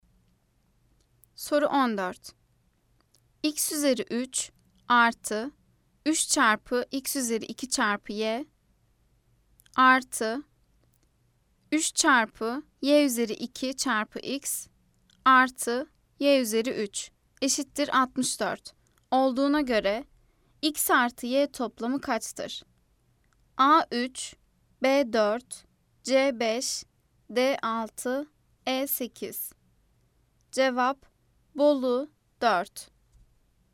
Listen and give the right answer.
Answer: Cevap Bolu 4.